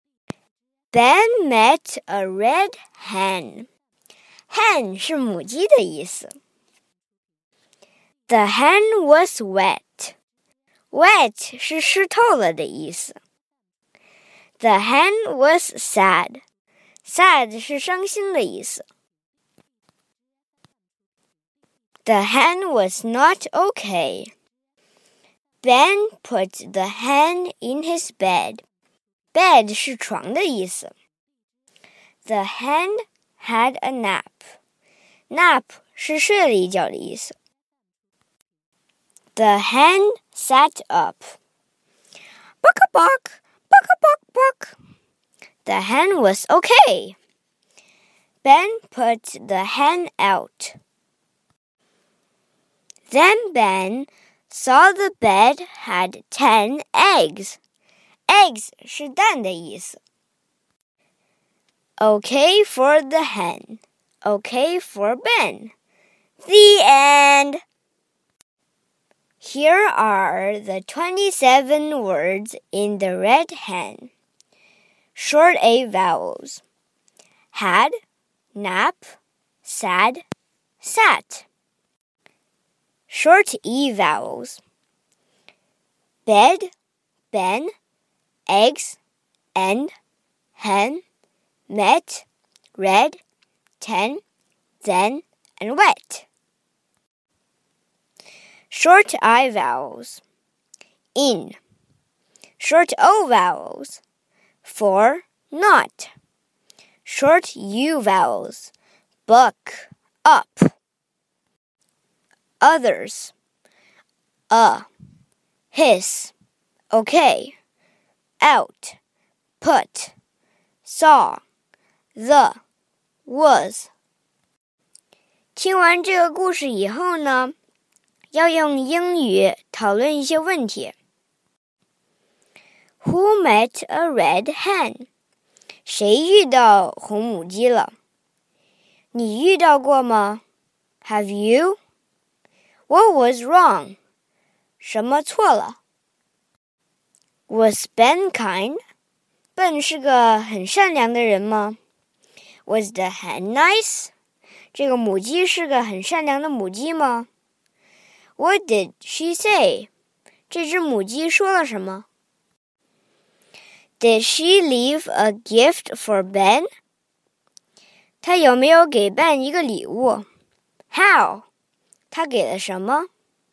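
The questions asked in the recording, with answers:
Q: Who met a red hen?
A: Ben

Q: What was wrong?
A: The hen was wet and sad, not okay

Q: was Ben kind?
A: Yes

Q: What did she say?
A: Buck a buck, buck a buck buck

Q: Did she leave a gift for Ben?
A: Yes, ten eggs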